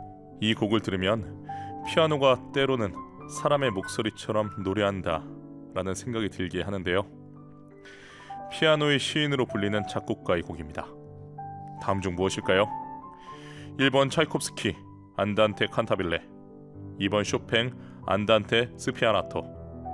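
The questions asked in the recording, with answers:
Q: 피아노의 시인으로 불리는 작곡가의 곡입니다. 다음 중 무엇일까요?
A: 2번: 쇼팽 안단테 스피아나토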